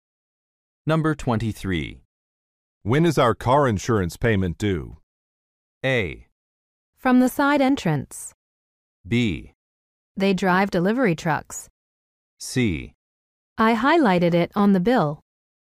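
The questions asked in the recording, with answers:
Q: When is our car insurance payment due?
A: C: I highlighted it on the bill.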